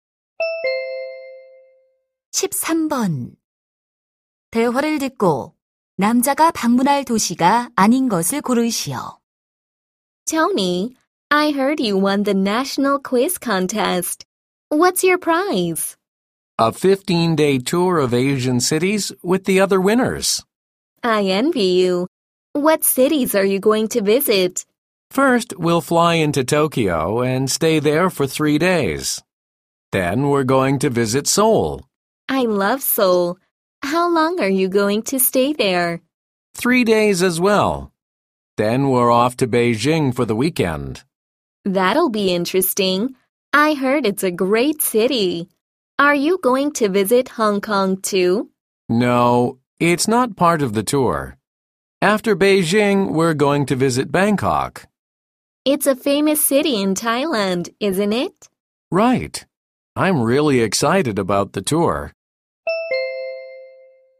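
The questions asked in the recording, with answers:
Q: 대화를 듣고 남자가 방문할 도시가 아닌 것을 고르시오.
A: 홍콩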